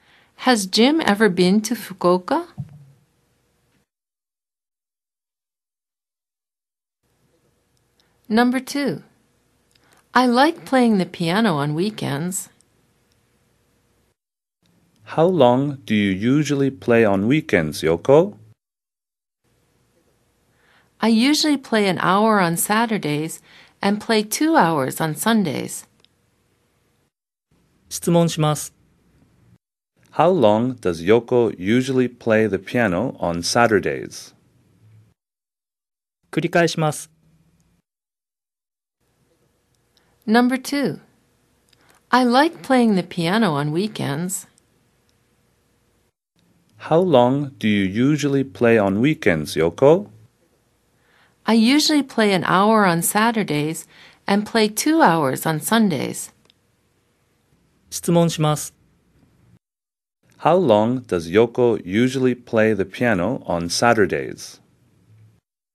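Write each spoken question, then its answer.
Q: How long does Yoko usually play the piano on Saturdays?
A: For an hour.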